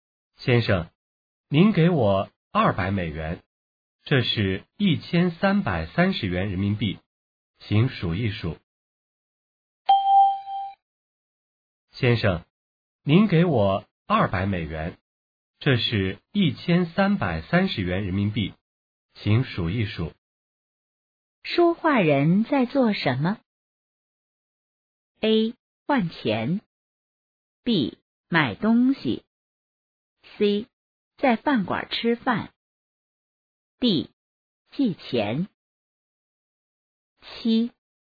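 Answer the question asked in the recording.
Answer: A: 换钱。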